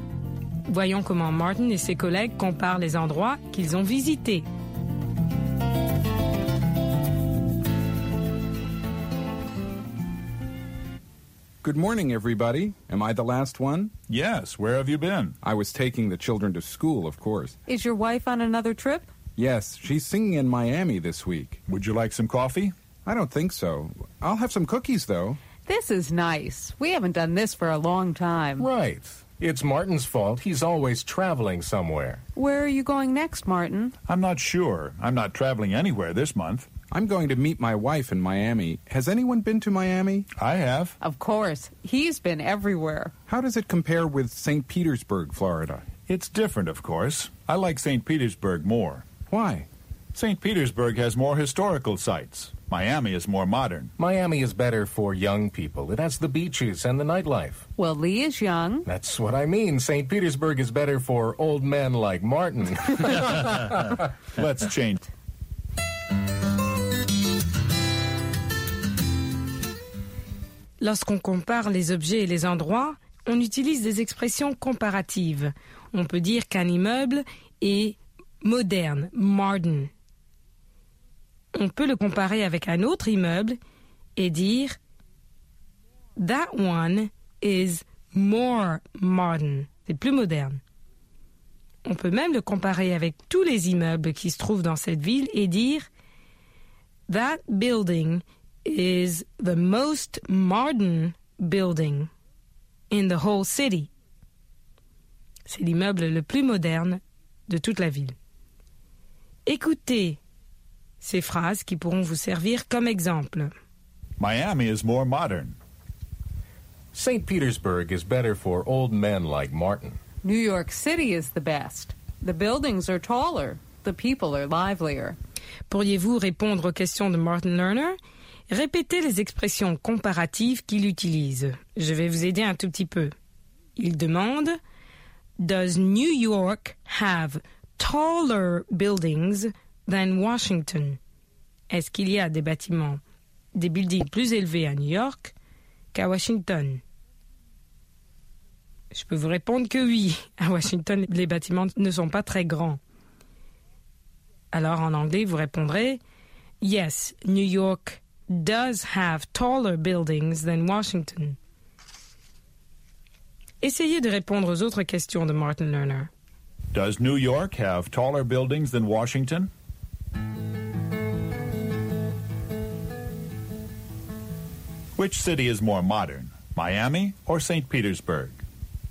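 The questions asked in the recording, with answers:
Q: Which city is more modern, Miami or St.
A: Miami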